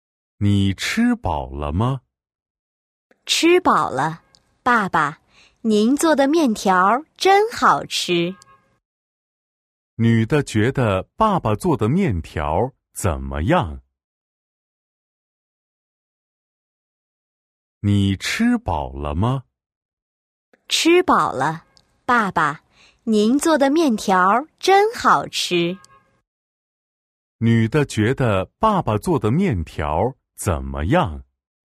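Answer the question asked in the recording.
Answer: 很好吃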